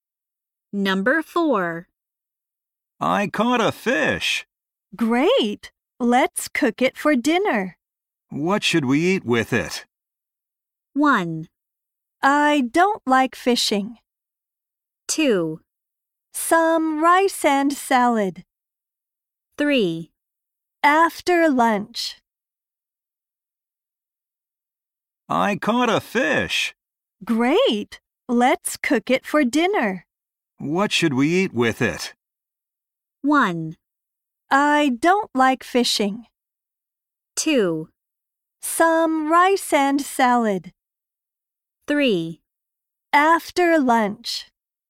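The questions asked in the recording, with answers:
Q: What should we eat with it?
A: 2: Some rice and salad.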